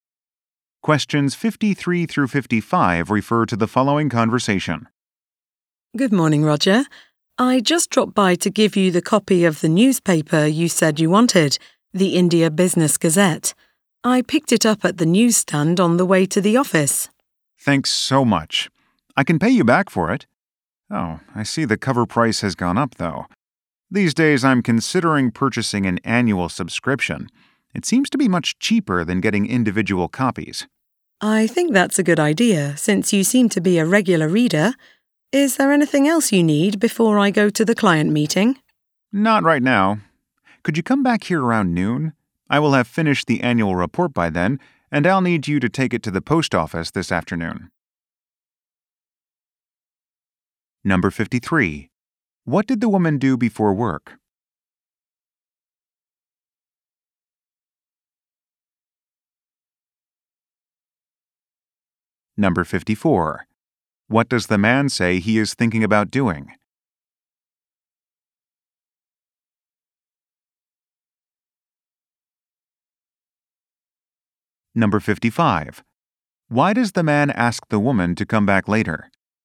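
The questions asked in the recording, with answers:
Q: What did the woman do before work?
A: Bought a newspaper at a newsstand

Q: What does the man say he is thinking about doing?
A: Buying an annual subscription

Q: Why does the man ask the woman to come back later?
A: To take the annual report to the post office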